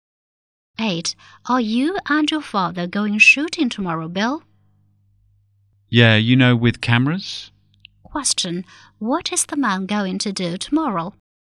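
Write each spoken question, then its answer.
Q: What is the man going to do tomorrow?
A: Take photographs with his father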